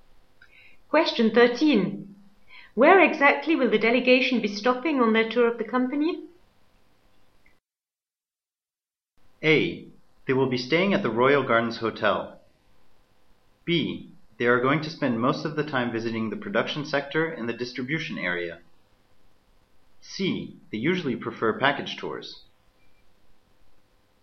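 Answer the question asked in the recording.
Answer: B: They are going to spend most of the time visiting the production sector and the distribution area.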